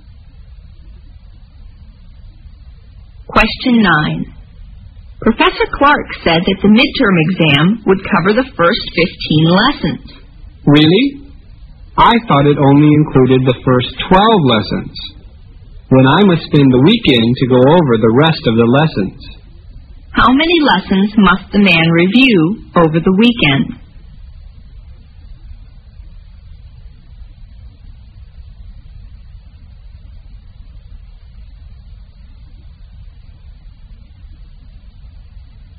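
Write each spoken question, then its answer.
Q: How many lessons must the man review over the weekend?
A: 3 lessons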